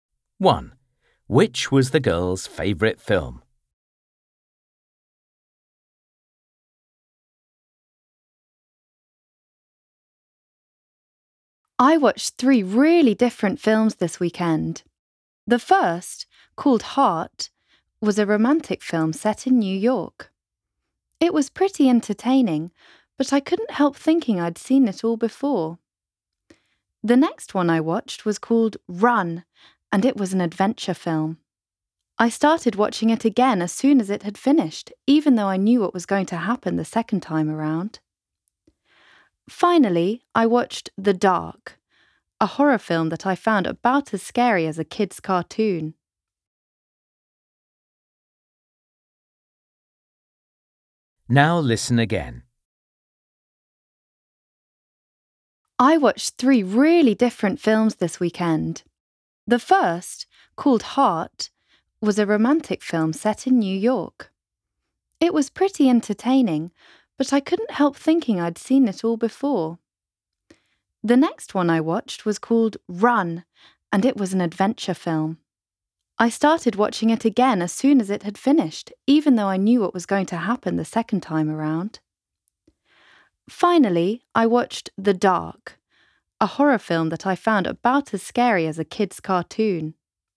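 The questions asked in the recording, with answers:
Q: Which was the girl's favourite film?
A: Run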